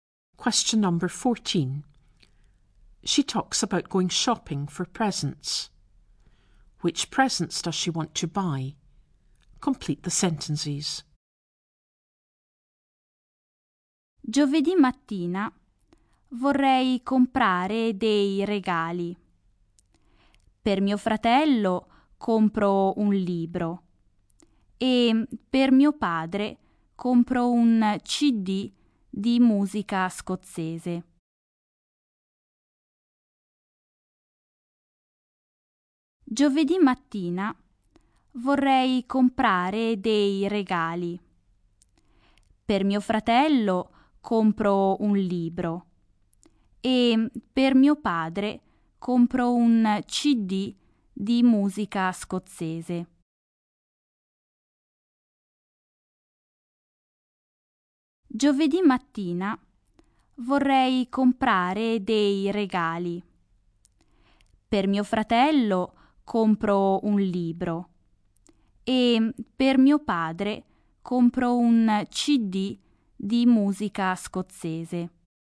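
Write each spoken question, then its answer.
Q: Which presents does she want to buy?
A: A book for her brother and a CD of Scottish music for her father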